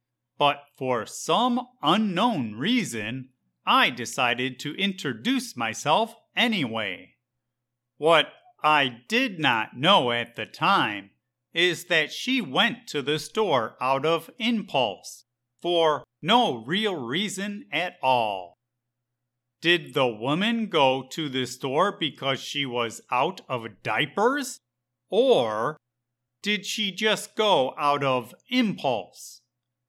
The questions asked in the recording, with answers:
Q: Did the woman go to the store because she was out of diapers?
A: Apparently, the woman went to the store out of impulse for no real reason at all.